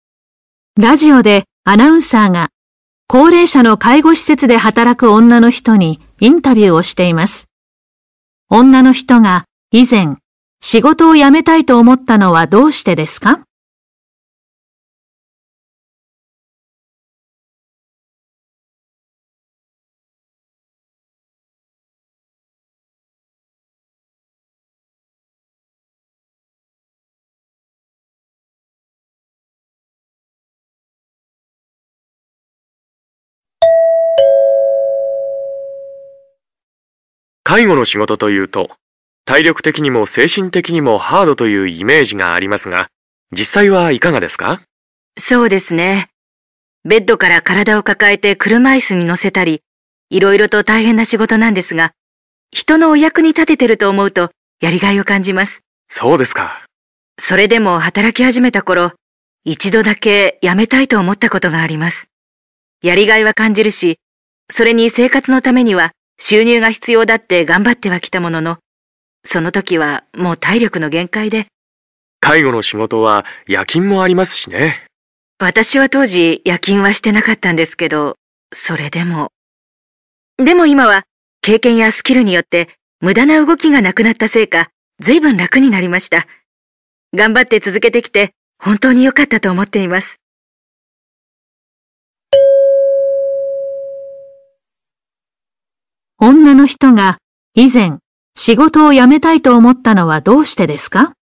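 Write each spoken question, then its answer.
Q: 女の人が以前仕事を辞めたいと思ったのはどうしてですか?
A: 体力の限界だったから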